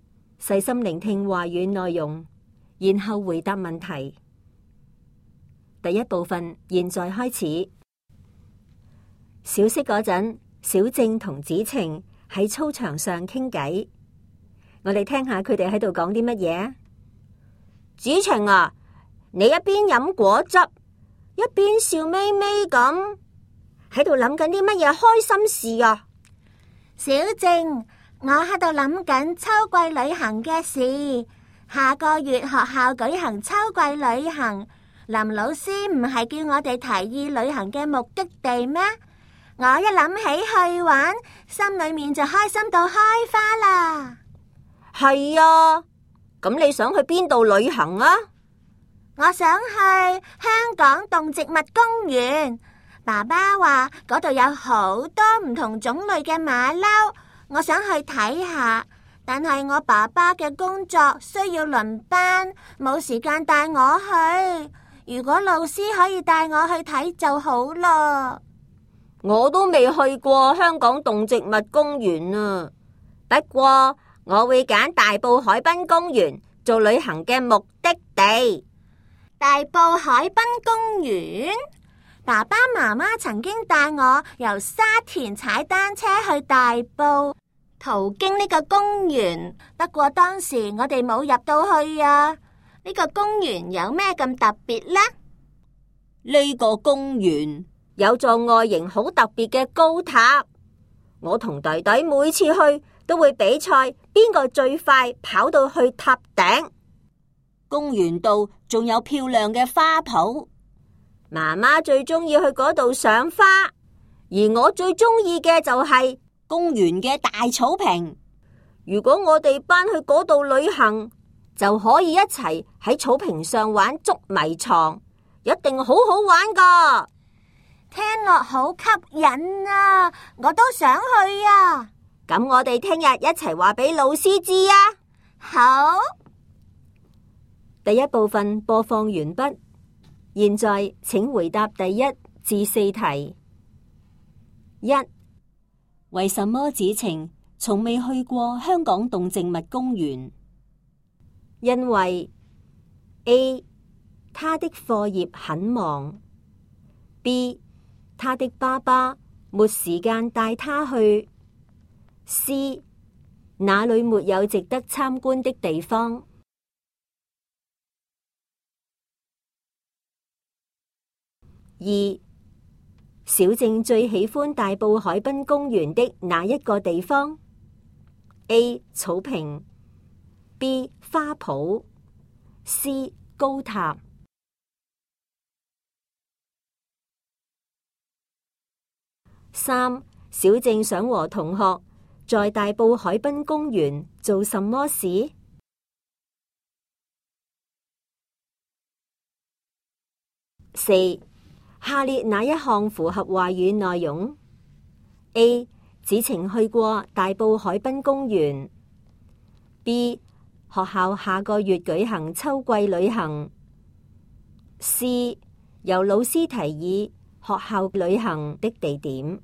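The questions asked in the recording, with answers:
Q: 为什么子晴从未去过香港动植物公园?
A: B: 他的爸爸没时间带他去

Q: 小静最喜欢大埔海滨公园的哪一个地方 ?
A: A: 草坪

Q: 小静想和同学在大埔海滨公园做什么事?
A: 在草坪上玩捉迷藏

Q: 下列哪一项符合话语内容 ?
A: B: 学校下个月举行秋季旅行。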